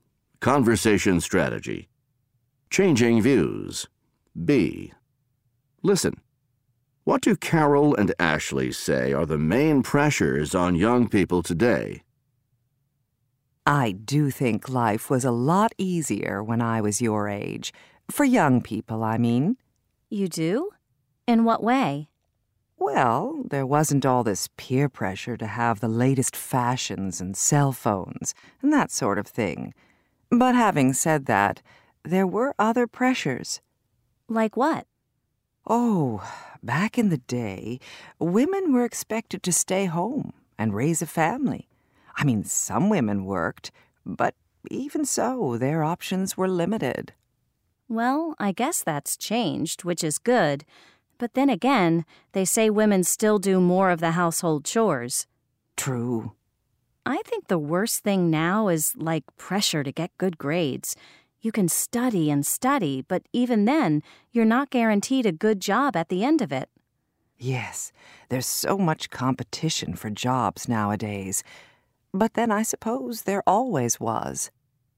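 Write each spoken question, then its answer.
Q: What do Carol and Ashley say are the main pressures on young people today?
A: Peer pressure to have the latest fashions and cell phones, and pressure to get good grades amid competition for jobs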